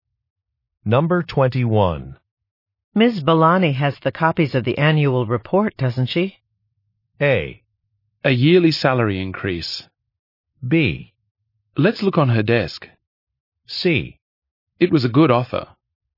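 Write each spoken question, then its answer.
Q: Ms. Balani has the copies of the annual report, doesn't she?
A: B: Let's look on her desk.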